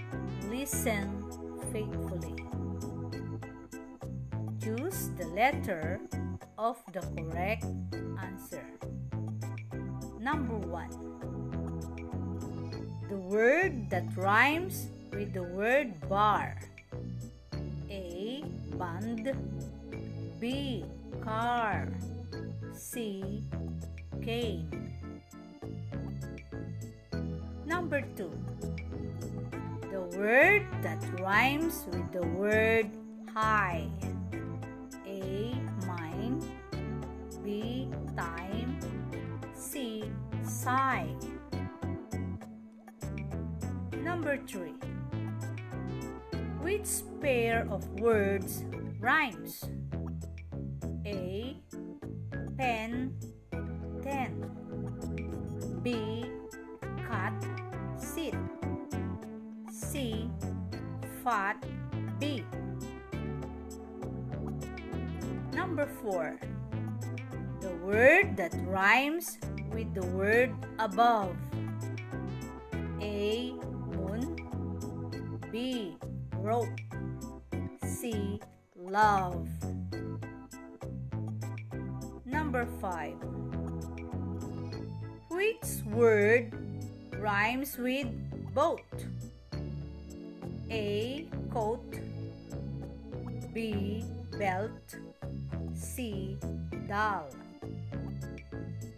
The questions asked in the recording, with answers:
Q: Which pair of words rhymes?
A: Letter A is the answer. Pen and pen.